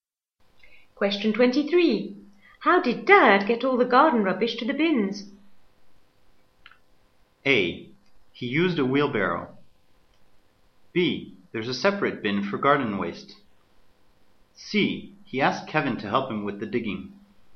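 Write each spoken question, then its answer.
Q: How did Dad get all the garden rubbish to the bins?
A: A: He used a wheelbarrow.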